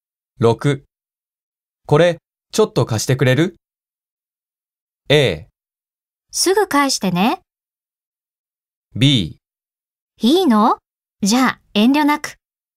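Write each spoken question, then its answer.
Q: これちょっと貸してくれる?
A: A: すぐ返してね。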